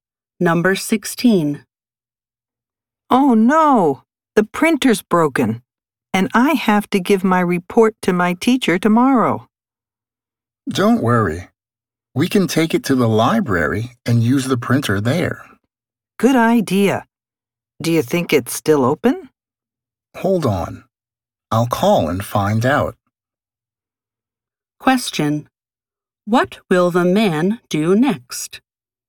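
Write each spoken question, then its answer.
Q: What will the man do next?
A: Call the library to find out if it's still open.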